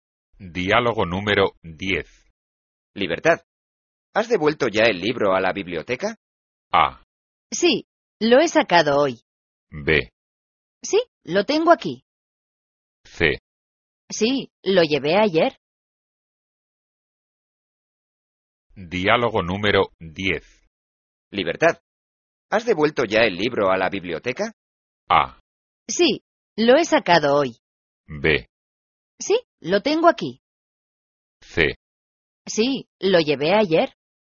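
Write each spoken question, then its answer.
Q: Libertad, ¿has devuelto ya el libro a la biblioteca?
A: C: Sí, lo llevé ayer.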